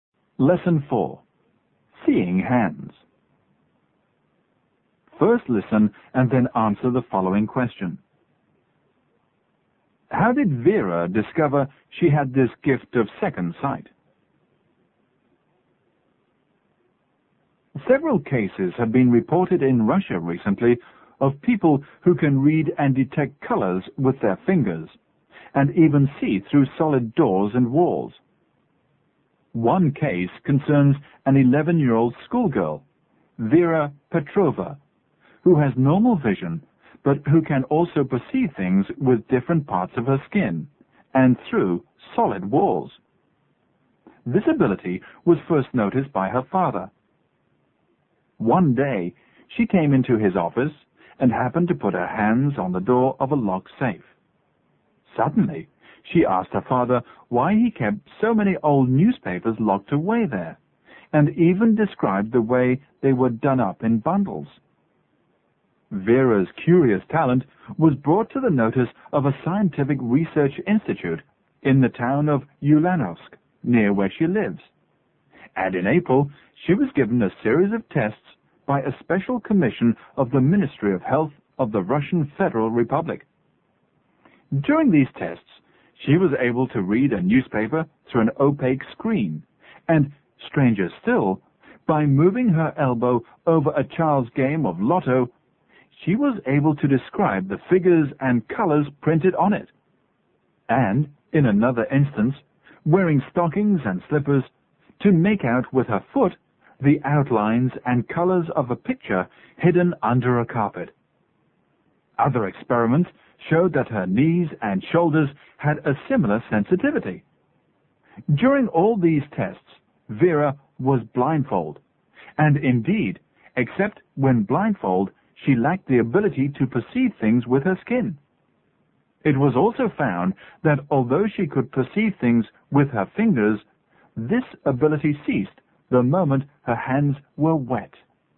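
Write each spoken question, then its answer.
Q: How did Vera discover she had this gift of second sight?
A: She put her hands on the door of her father's locked safe and described the old newspapers inside.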